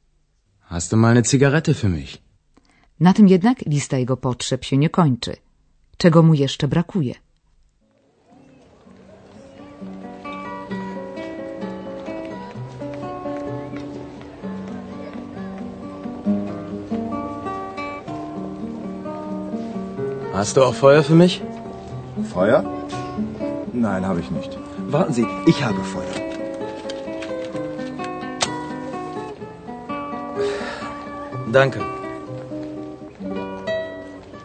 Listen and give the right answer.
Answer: Oczywiście do zapalenia papierosa potrzebny jest jeszcze ogień, Feuer.